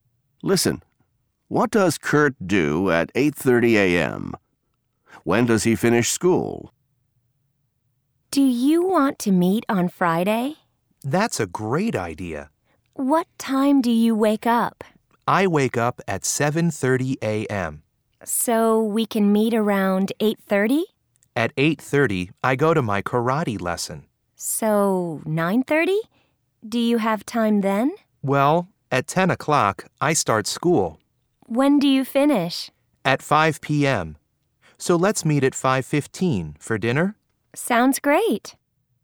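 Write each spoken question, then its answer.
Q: What does Kurt do at 8:30 a.m.?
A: He goes to his karate lesson.

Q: When does he finish school?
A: At 5 p.m.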